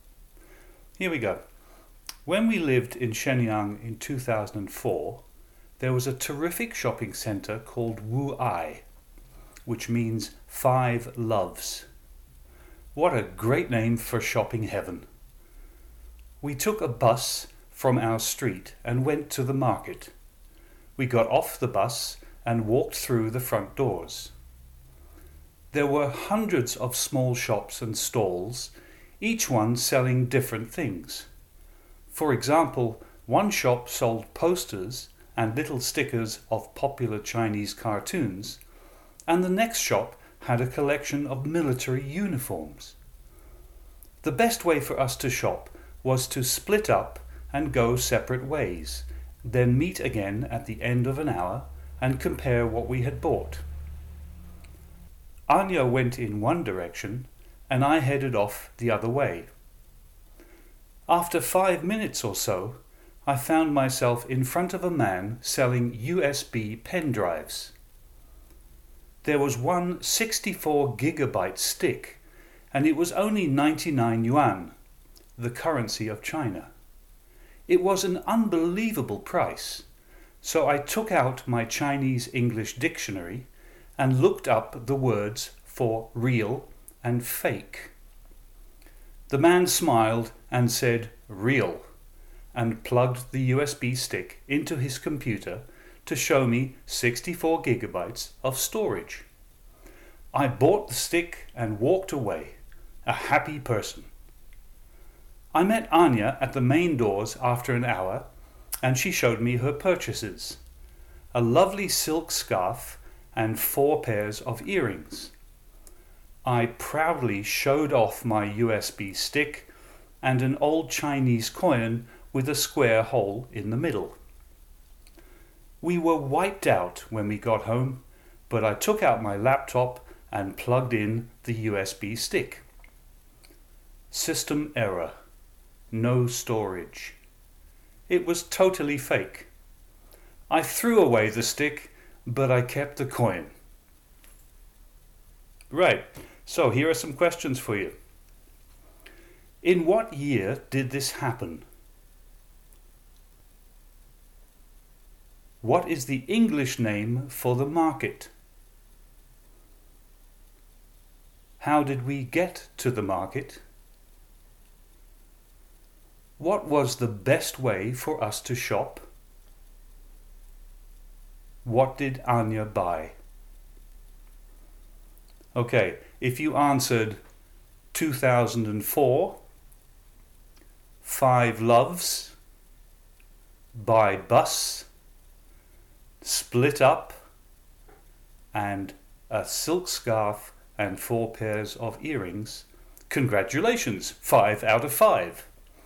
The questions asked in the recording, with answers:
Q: In what year did this happen?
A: 2004

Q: What is the English name for the market?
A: five loves

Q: How did we get to the market?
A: by bus

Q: What was the best way for us to shop?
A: split up